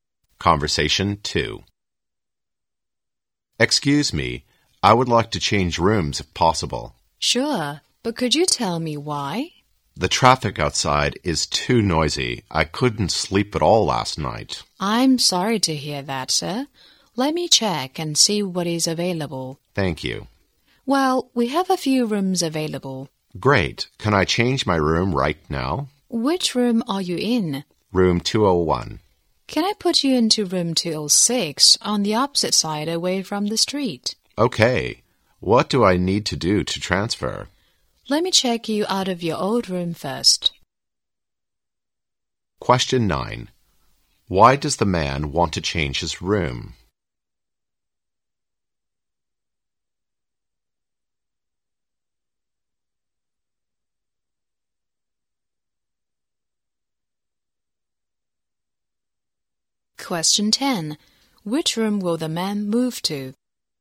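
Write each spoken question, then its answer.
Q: Why does the man want to change his room?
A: The traffic outside is too noisy

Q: Which room will the man move to?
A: Room 206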